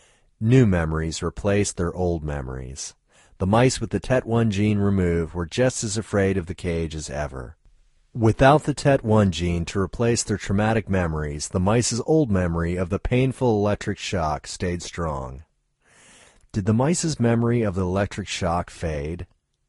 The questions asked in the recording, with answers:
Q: Did the mice's memory of the electric shock fade?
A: No, the mice's memory of the electric shock didn't fade.